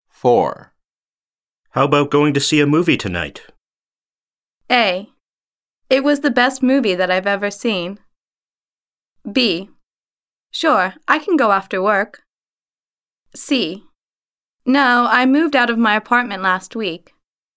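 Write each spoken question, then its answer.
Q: How about going to see a movie tonight?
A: B: Sure, I can go after work.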